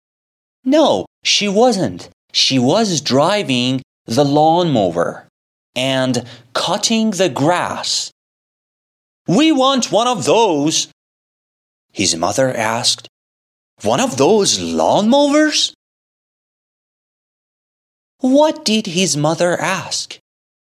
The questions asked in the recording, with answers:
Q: What did his mother ask?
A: She asked, one of those lawnmowers?